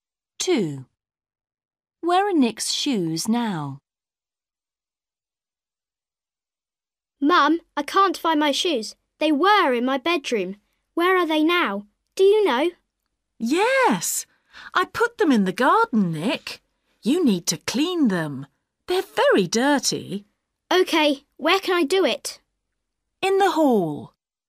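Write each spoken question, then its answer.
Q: Where are Nick's shoes now?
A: In the garden.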